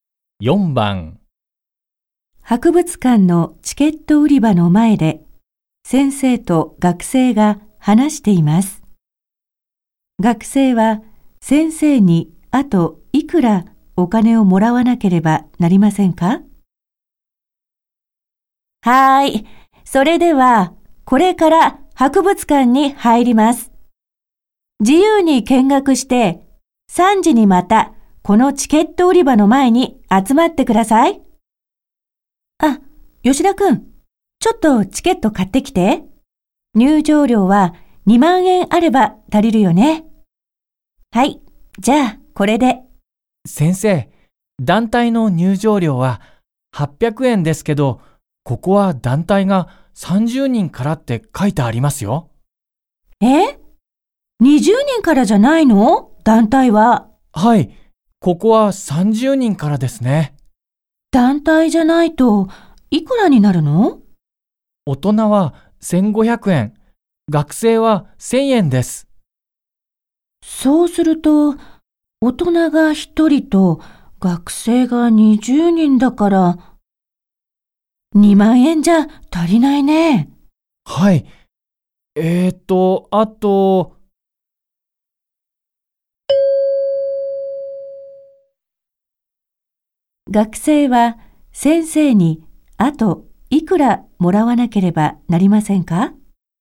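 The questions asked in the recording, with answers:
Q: 学生は先生にあといくらもらわなければなりませんか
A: 1500円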